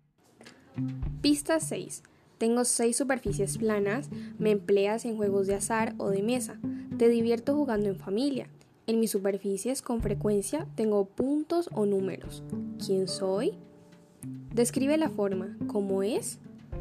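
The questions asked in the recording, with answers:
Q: ¿Quién soy?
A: un dado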